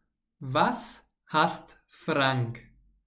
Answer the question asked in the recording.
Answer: Unordnung und Unpünktlichkeit.